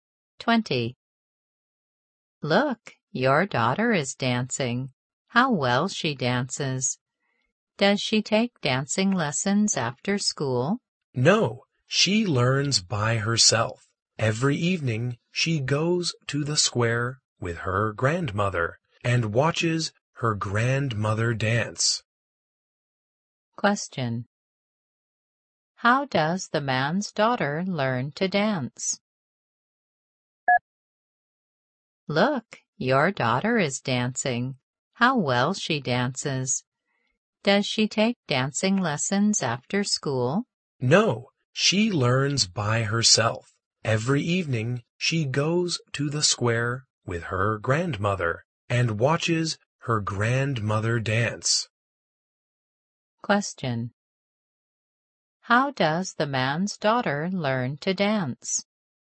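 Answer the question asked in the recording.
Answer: By herself, by watching her grandmother dance in the square.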